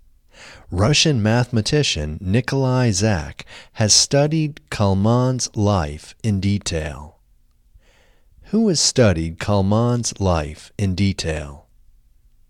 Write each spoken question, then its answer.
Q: Who has studied Kalman's life in detail?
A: Russian mathematician Nikolai Zak has studied Kalman's life in detail.